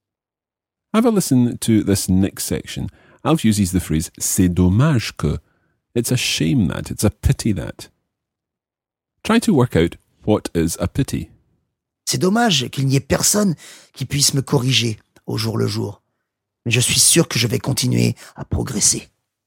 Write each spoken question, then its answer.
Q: Try to work out what is a pity.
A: The main gist of this is the fact that Alf thinks it's a pity that there's no one who can correct him every day.